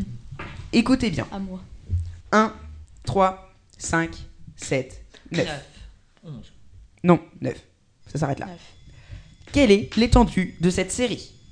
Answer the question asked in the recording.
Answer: Ben, je dirais que l'étendue, c'est 8.